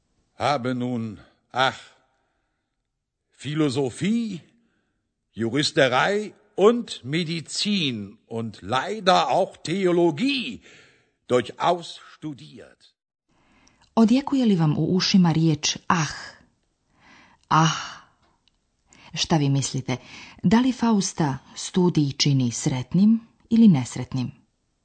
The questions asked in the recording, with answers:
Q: Da li Fausta studij čini sretnim ili nesretnim?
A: Tačno, nesretnim.